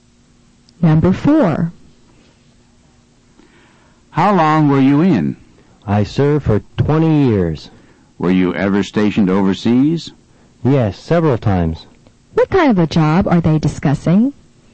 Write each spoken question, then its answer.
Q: What kind of a job are they discussing?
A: Number four is C, a military career.